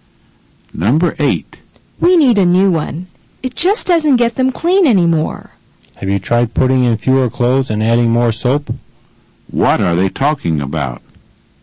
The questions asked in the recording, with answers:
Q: What are they talking about?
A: They're talking about a washing machine.